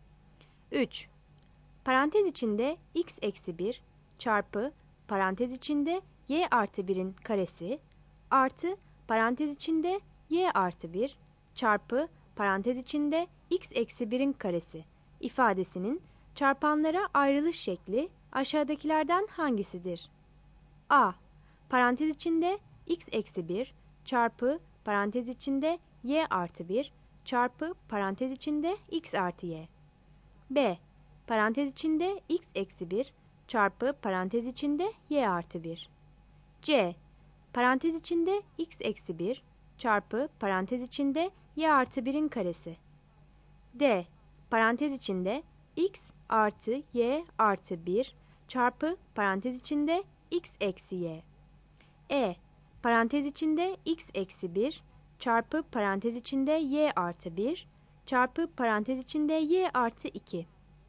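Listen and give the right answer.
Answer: A: (x-1)(y+1)(x+y)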